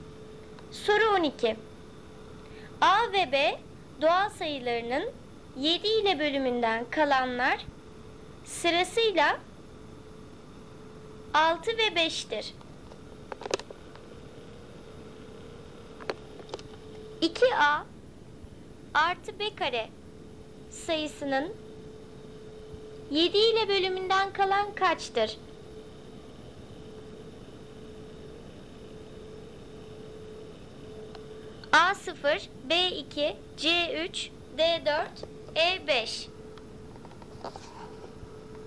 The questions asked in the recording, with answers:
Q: 2A artı B kare sayısının 7 ile bölümünden kalan kaçtır?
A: Doğru cevap B 2.